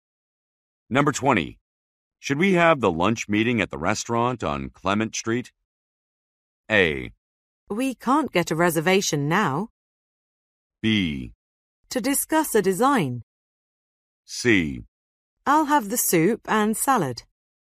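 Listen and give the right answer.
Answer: A: We can't get a reservation now.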